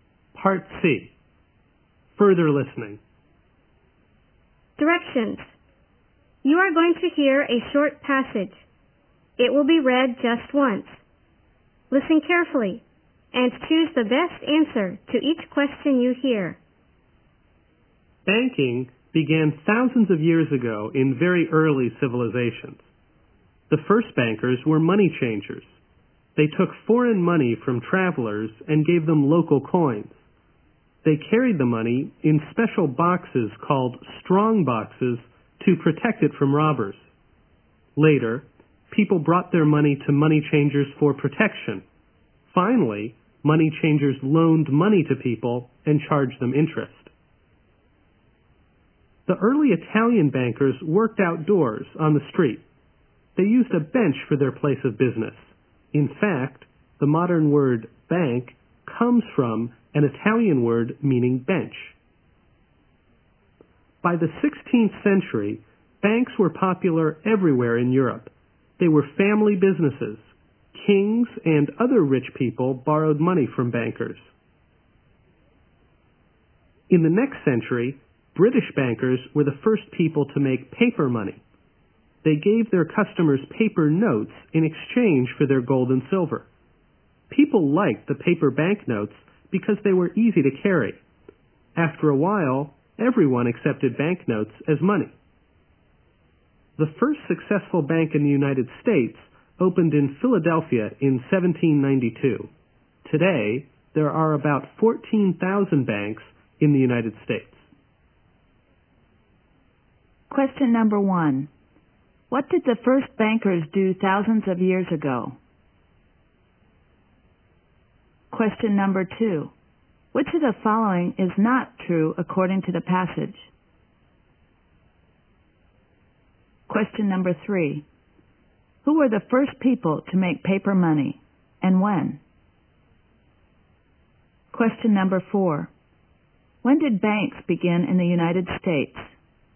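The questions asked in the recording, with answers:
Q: What did the first bankers do thousands of years ago?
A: They were money changers who took foreign money from travelers and gave them local coins

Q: Who were the first people to make paper money, and when?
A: British bankers, in the 17th century

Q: When did banks begin in the United States?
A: In 1792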